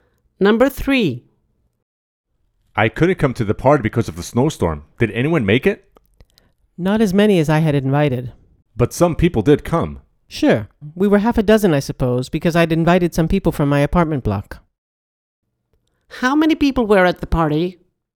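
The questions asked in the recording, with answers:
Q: How many people were at the party?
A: about six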